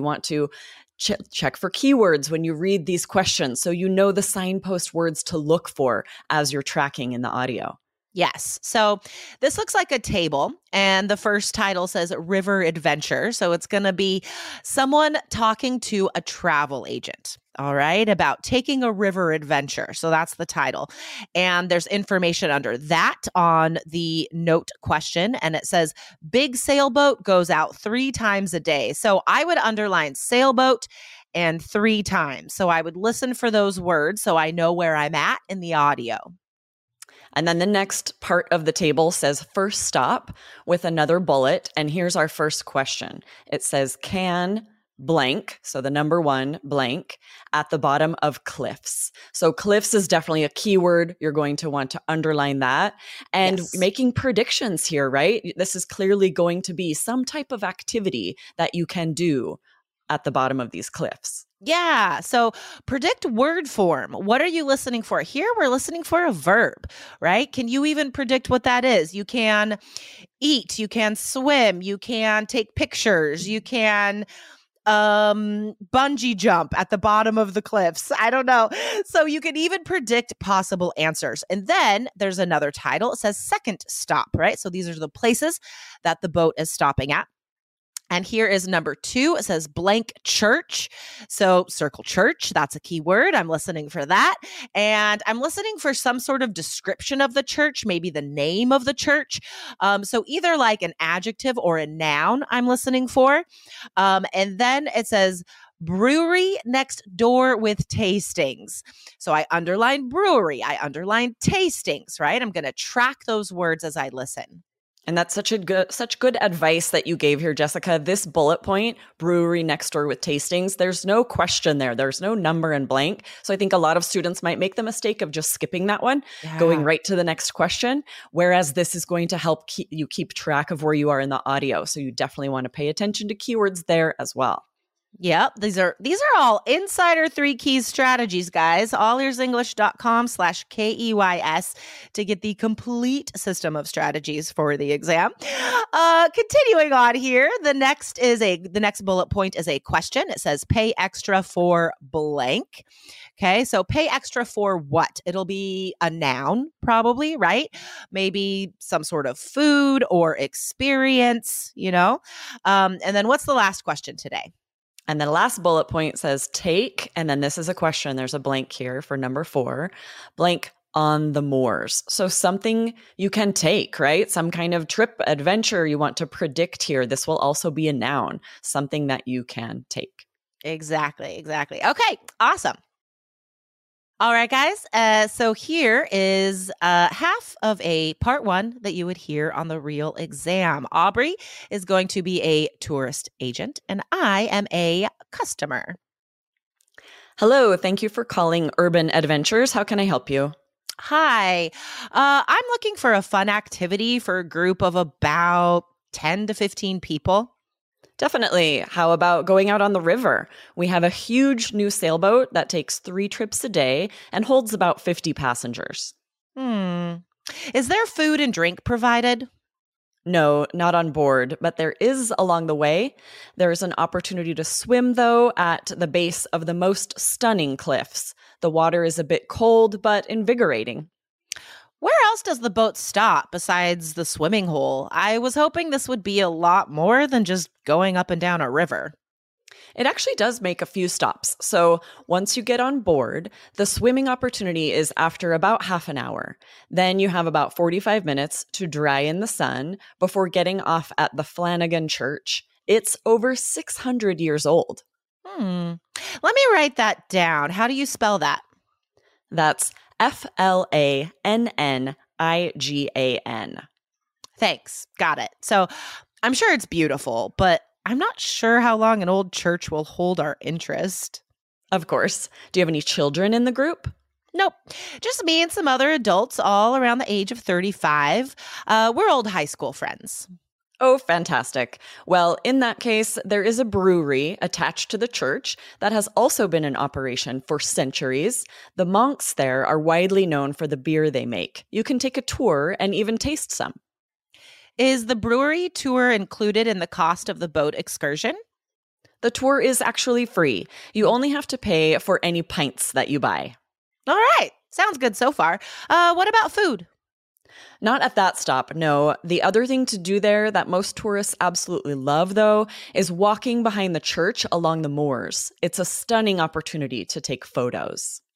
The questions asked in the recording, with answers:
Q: can blank, so the number one blank, at the bottom of cliffs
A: So the answer is swim.

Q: blank church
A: you might hear them say the Flanagan Church

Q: pay extra for blank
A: And the answer is pints or beer, right?

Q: take, and then this is a question. There's a blank here for number four, blank on the moors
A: And I mean, you should just write photos, right?